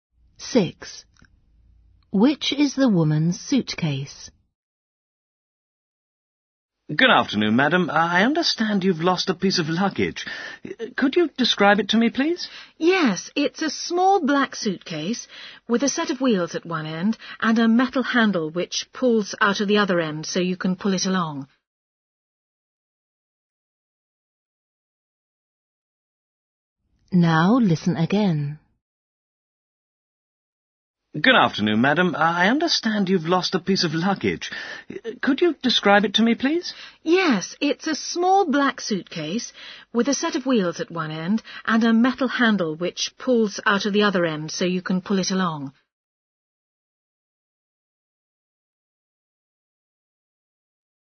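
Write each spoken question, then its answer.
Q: Which is the woman's suitcase?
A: a small black suitcase with wheels at one end and a pull-out metal handle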